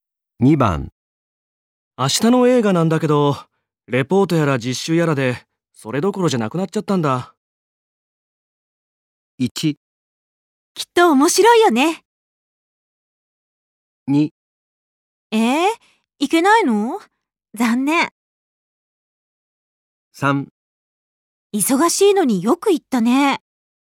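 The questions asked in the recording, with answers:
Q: 明日の映画なんだけど、レポートやら実習やらで、それどころじゃなくなっちゃったんだ。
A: 2: いけないの?残念。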